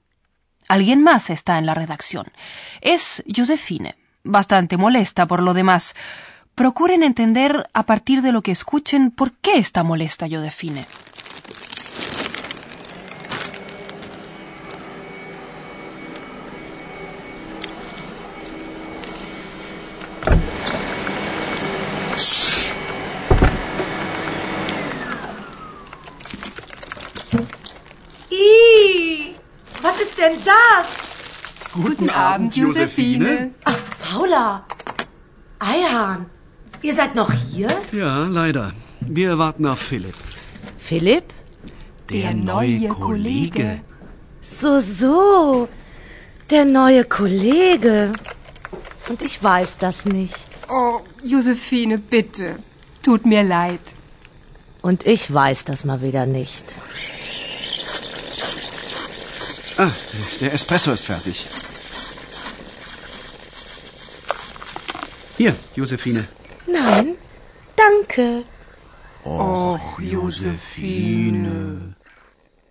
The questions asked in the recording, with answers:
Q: Procuren entender, a partir de lo que escuchen, por qué está molesta Josefine.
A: Se entiende, puesto que Josefine tiene un trato amistoso con Paula y Ayhan, es lógico que le moleste no haber sido informada.